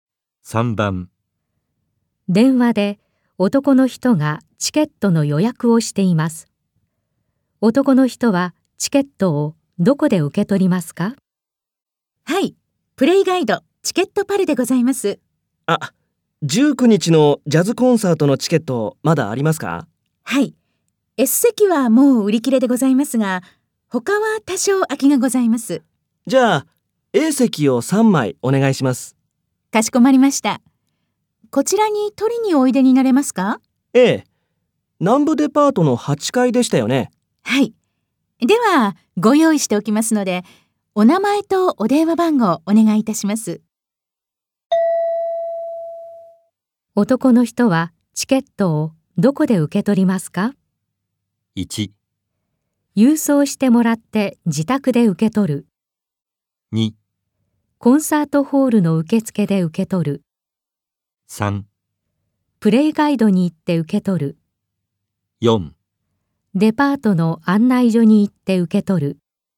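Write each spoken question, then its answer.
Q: 男の人はチケットをどこで受け取りますか?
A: 3: プレイガイドに行って受け取る。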